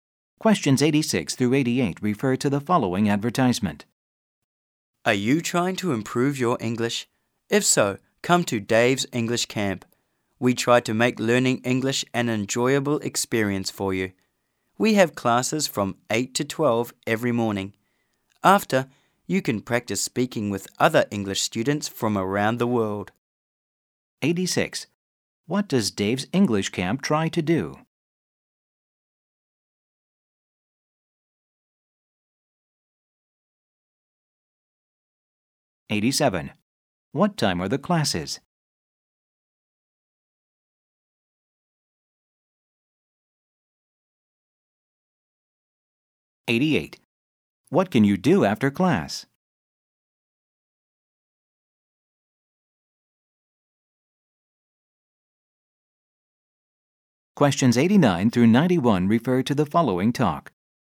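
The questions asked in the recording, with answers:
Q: What does Dave's English Camp try to do?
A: Make learning English enjoyable

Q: What time are the classes?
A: From 8 to 12 every morning

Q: What can you do after class?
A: Practice speaking with students from around the world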